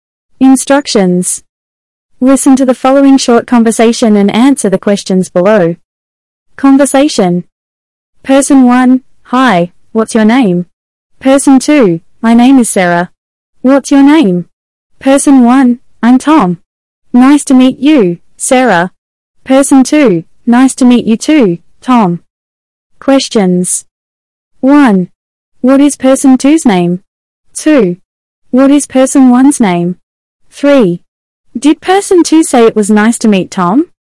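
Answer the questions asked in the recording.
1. Sarah
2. Tom
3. Yes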